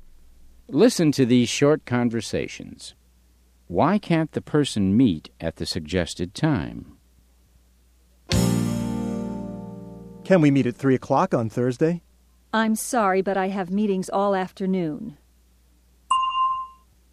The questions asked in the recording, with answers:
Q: Why can't the person meet at the suggested time?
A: She has meetings in the afternoon.